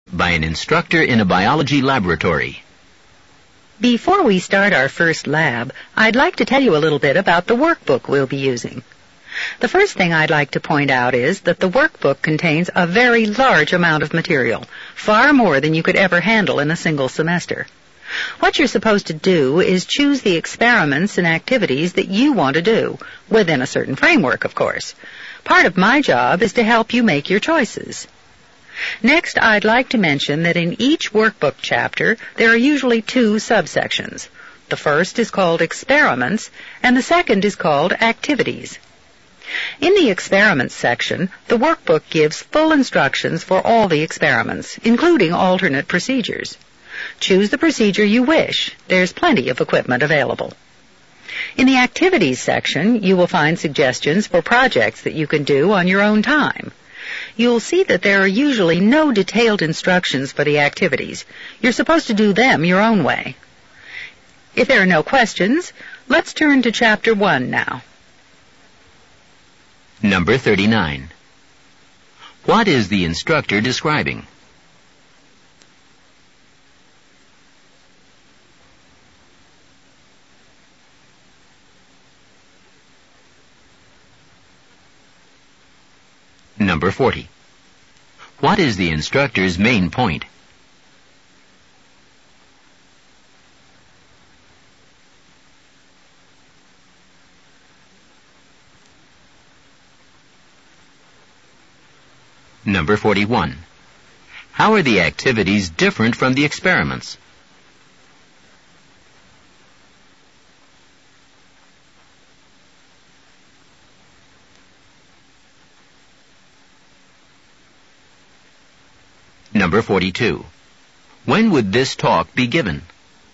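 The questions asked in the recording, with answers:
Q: What is the instructor describing?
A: The lab workbook

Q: How are the activities different from the experiments?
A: They have no detailed instructions and are done on students' own time

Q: When would this talk be given?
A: Before the first lab, at the start of the semester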